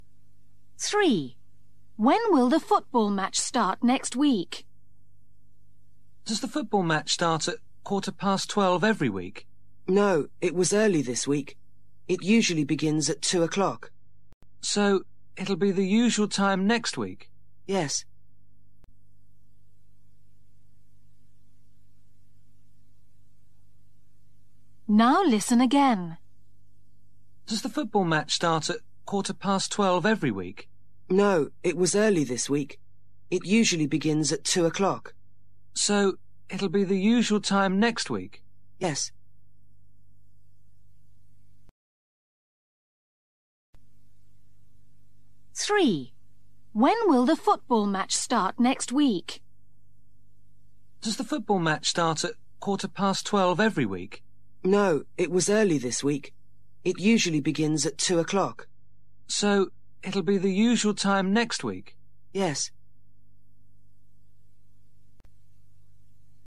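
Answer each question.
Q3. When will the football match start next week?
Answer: At 2 o'clock

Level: KELAS 6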